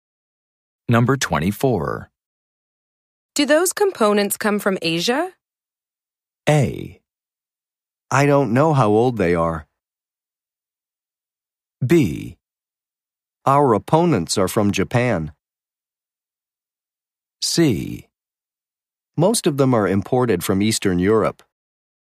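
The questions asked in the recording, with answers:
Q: Do those components come from Asia?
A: C: Most of them are imported from Eastern Europe.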